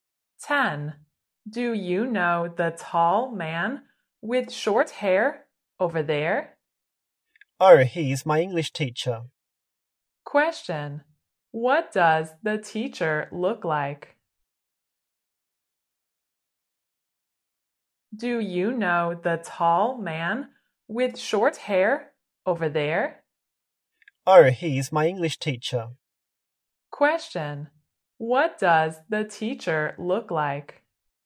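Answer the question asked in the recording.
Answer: Tall with short hair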